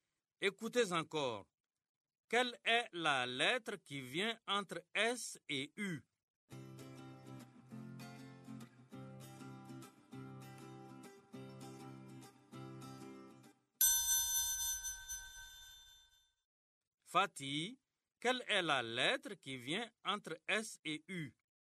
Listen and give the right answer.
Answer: Monsieur, c'est T.